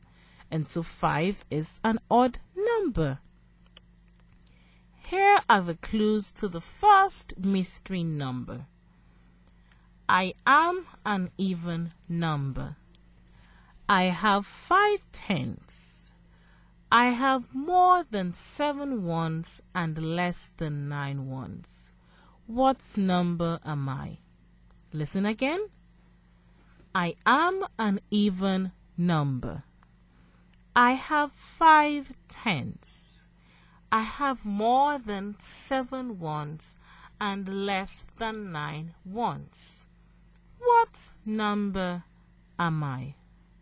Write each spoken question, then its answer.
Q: What number am I?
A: The mystery number is 58.